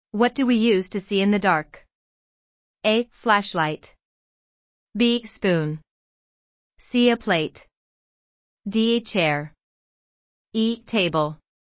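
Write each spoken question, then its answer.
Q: What do we use to see in the dark?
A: A: Flashlight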